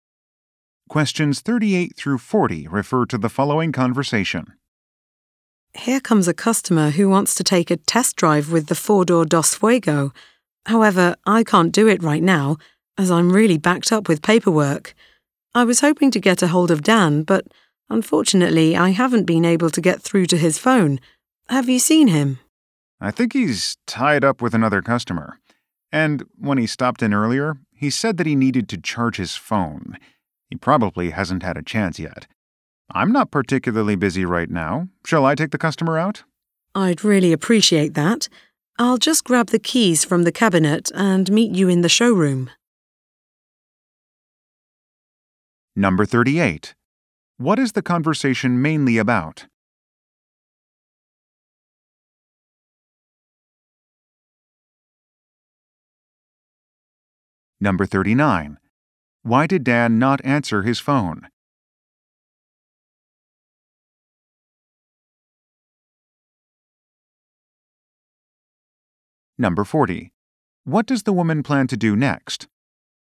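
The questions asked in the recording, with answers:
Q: What is the conversation mainly about?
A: A customer's test drive

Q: Why did Dan not answer his phone?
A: His phone needed charging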